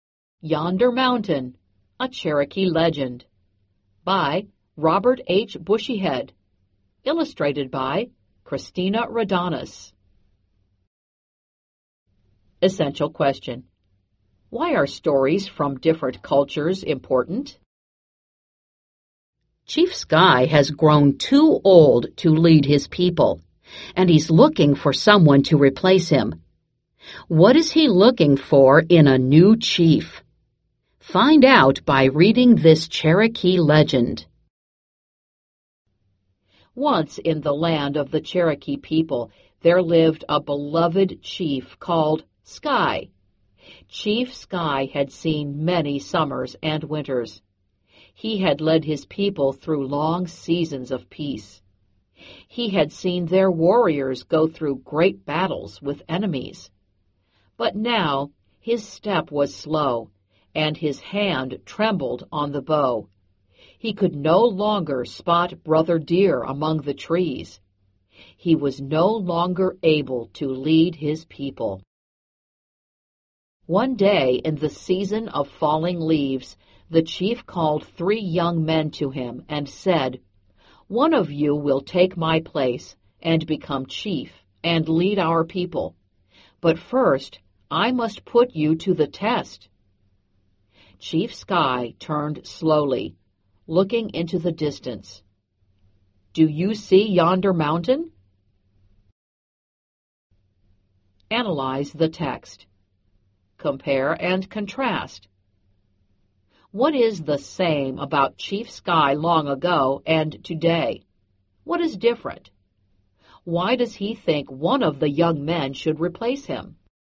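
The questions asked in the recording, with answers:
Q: Why does he think one of the young men should replace him?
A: He is too old and can no longer lead his people.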